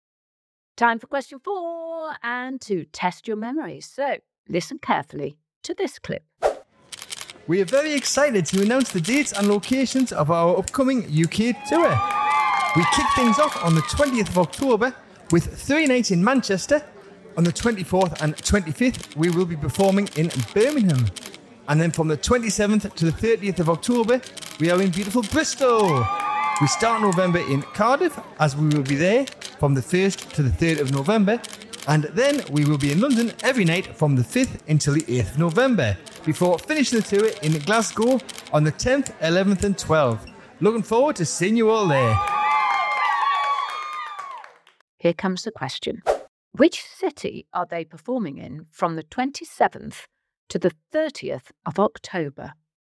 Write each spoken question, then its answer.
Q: Which city are they performing in from the 27th to the 30th of October?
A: The answer was, my hometown now, beautiful Bristol.